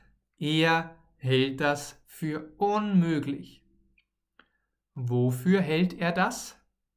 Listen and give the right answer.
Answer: für unmöglich. Er hält das für unmöglich.